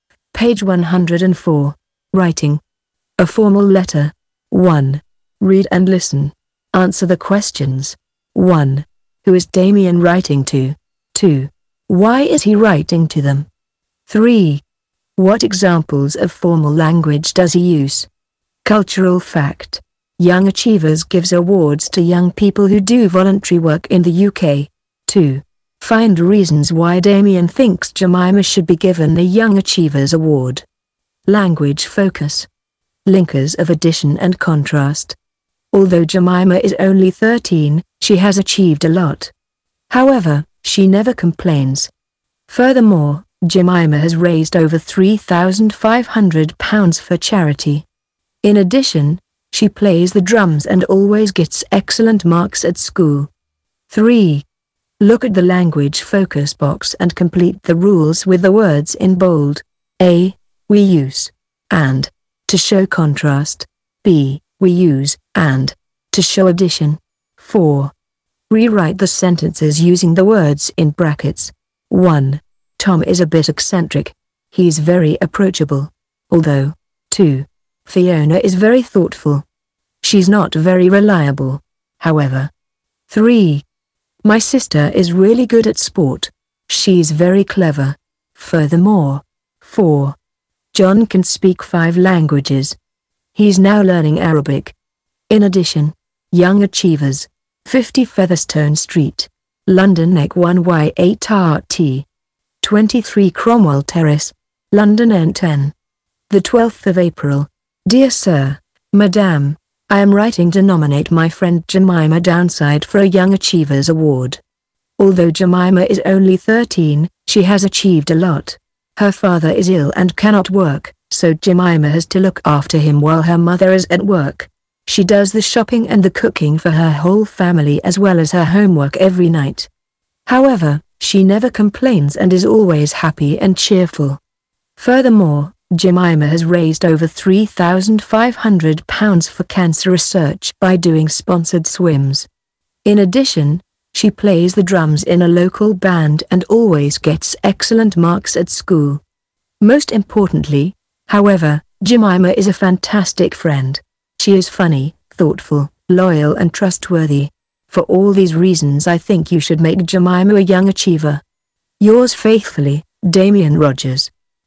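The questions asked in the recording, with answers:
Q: Who is Damien writing to?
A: Young Achievers

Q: Why is he writing to them?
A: To nominate his friend Jemima Downside for a Young Achievers Award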